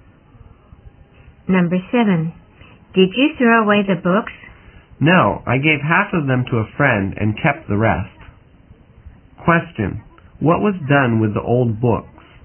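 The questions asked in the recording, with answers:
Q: What was done with the old books?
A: Half were given to a friend and the rest were kept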